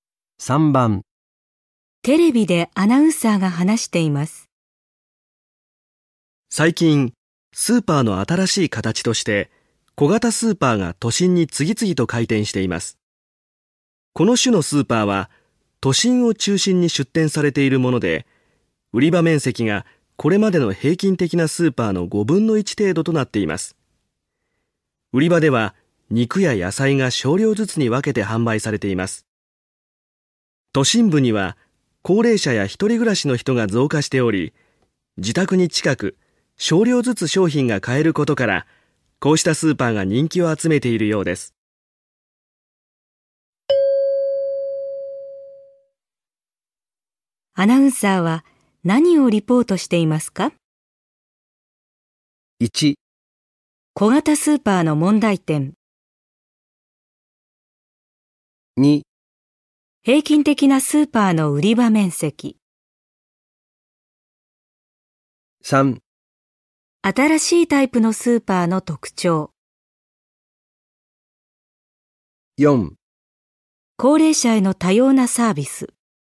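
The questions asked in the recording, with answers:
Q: アナウンサーは何をリポートしていますか?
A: 3: 新しいタイプのスーパーの特徴。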